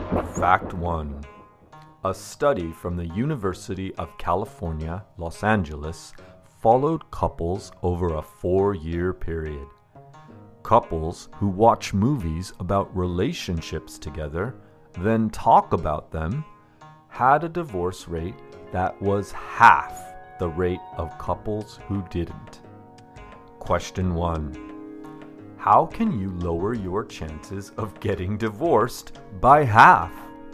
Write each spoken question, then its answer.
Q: how can you lower your chances of getting divorced by half?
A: You can watch movies about relationships together, then talk about them.